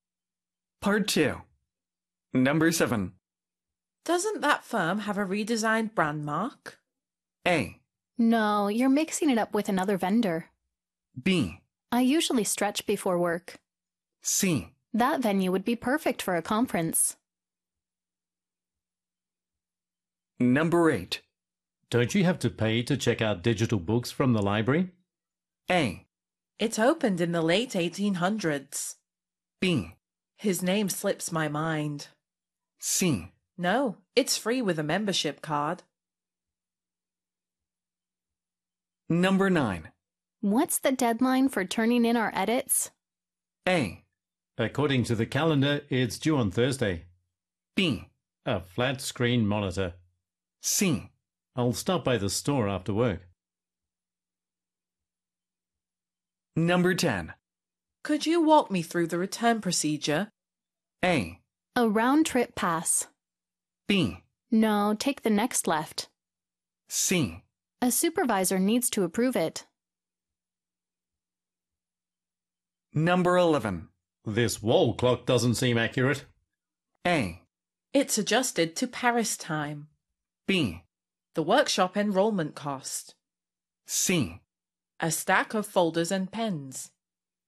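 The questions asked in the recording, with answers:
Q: Doesn't that firm have a redesigned brand mark?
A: A: No, you're mixing it up with another vendor.

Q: Don't you have to pay to check out digital books from the library?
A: C: No, it's free with a membership card.

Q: What's the deadline for turning in our edits?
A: A: According to the calendar, it's due on Thursday.

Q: Could you walk me through the return procedure?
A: C: A supervisor needs to approve it.

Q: This wall clock doesn't seem accurate.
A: A: It's adjusted to Paris time.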